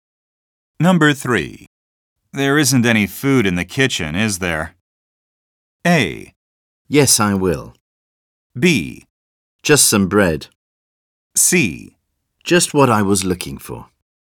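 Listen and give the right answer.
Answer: B: Just some bread.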